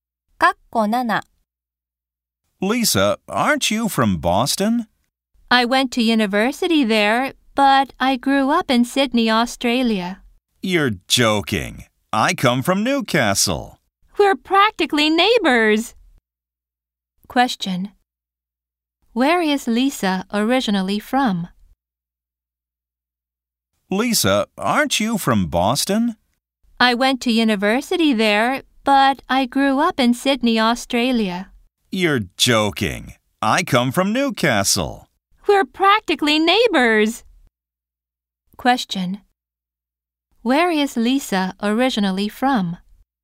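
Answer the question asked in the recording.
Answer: Sydney, Australia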